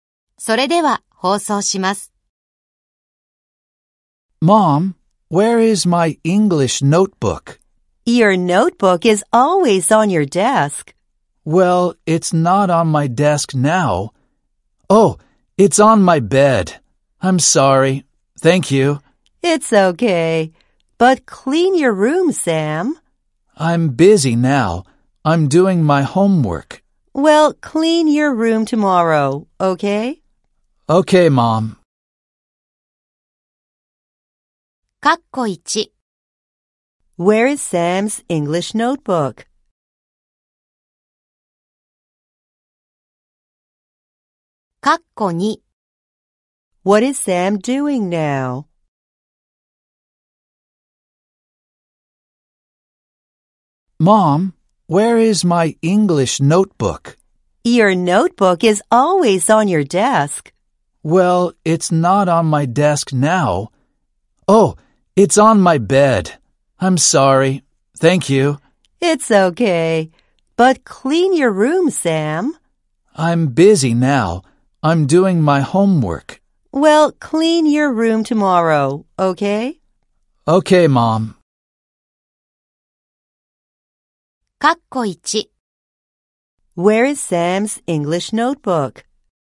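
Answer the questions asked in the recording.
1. On his bed
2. He is doing his homework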